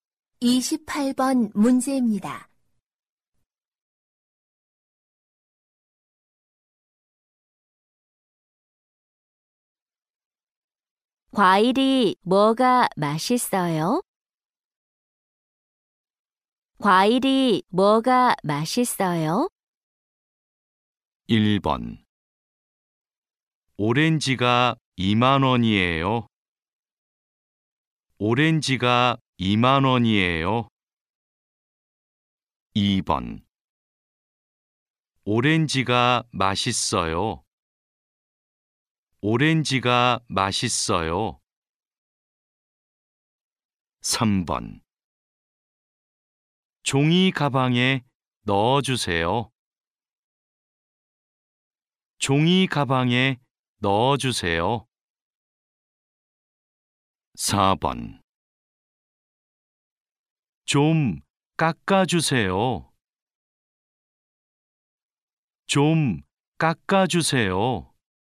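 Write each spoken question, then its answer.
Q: 과일이 뭐가 맛있어요?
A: 2: 오렌지가 맛있어요.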